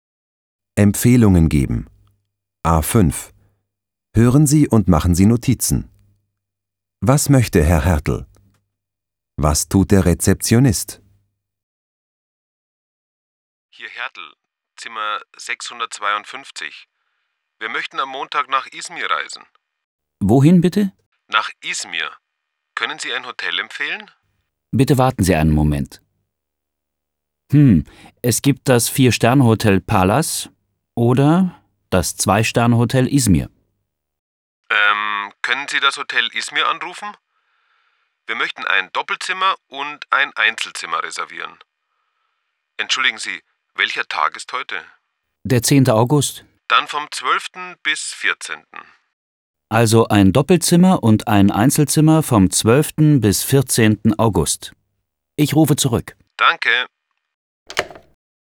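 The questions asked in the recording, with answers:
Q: Was möchte Herr Hertel?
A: Er möchte nach Izmir reisen und ein Hotel mit einem Doppelzimmer und einem Einzelzimmer vom 12. bis 14. August reservieren.

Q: Was tut der Rezeptionist?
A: Er empfiehlt das Hotel Palace oder das Hotel Izmir und ruft zurück.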